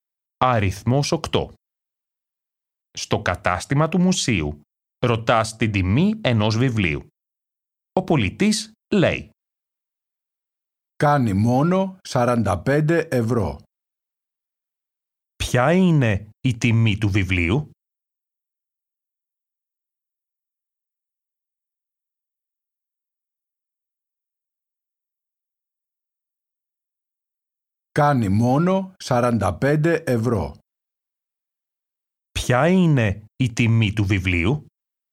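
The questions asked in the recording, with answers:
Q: Ποια είναι η τιμή του βιβλίου?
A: 45 ευρώ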